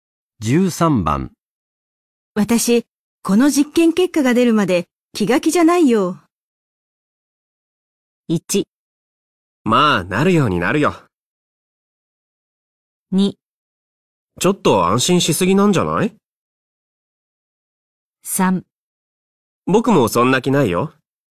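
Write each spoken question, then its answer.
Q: 私、この実験結果が出るまで気が気じゃないよ。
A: 1: まあ、なるようになるよ。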